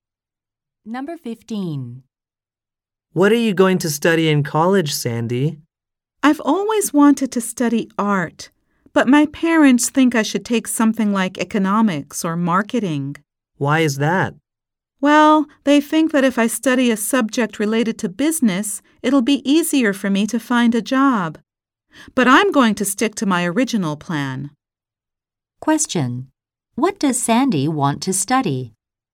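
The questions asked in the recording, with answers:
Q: What does Sandy want to study?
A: Art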